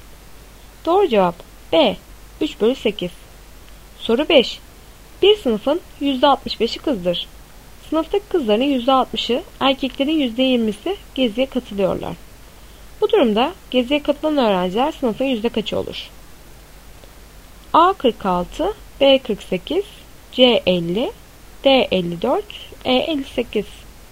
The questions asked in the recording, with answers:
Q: Bu durumda geziye katılan öğrenciler sınıfın yüzde kaçı olur?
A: Doğru cevap A 46.